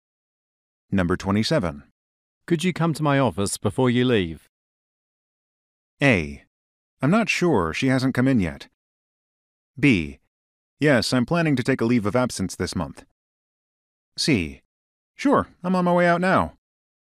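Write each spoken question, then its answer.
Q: Could you come to my office before you leave?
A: C: Sure, I'm on my way out now.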